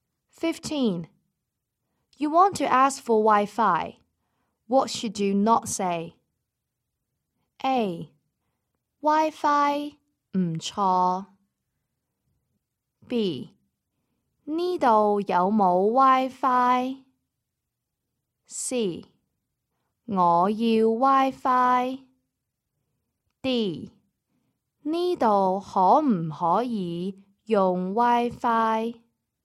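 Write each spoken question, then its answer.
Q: What should you not say?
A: A: Wi-Fi 唔錯。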